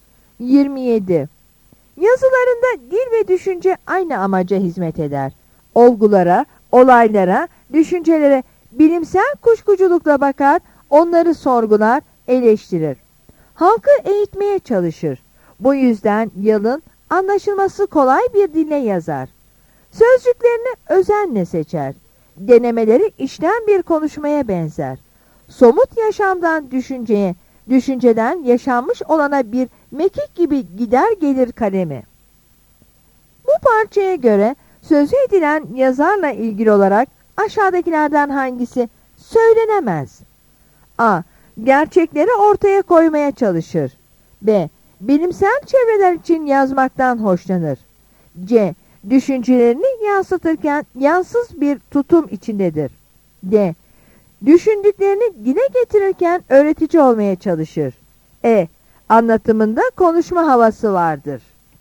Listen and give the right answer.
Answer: Yanıt B'dir.